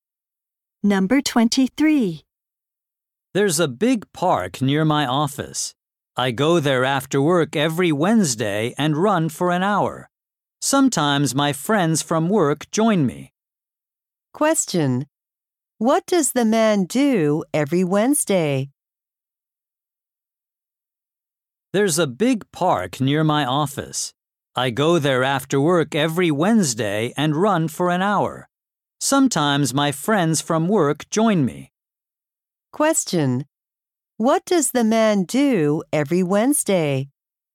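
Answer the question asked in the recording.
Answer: He runs in the park for an hour after work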